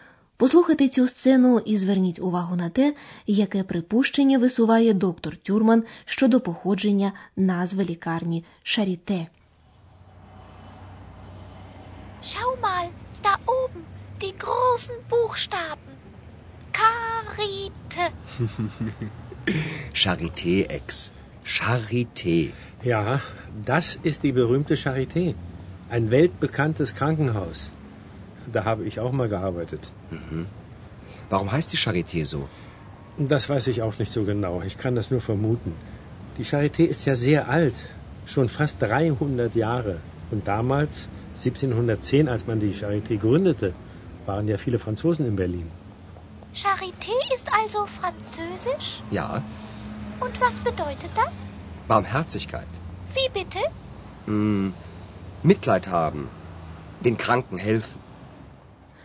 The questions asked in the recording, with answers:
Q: Послухайте цю сцену і зверніть увагу на те, яке припущення висуває доктор Тюрман щодо походження назви лікарні Шаріте.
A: Charité – це французьке слово. Коли майже 300 років тому було засновано лікарню, в Берліні було багато емігрантів з Франції. Можливо, саме через це лікарня отримала французьку назву.